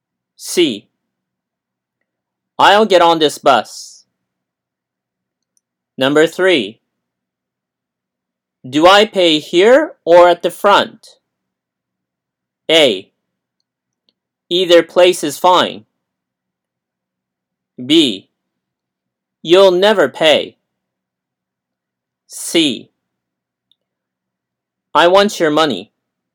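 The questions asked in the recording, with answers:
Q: Do I pay here or at the front?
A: A: Either place is fine.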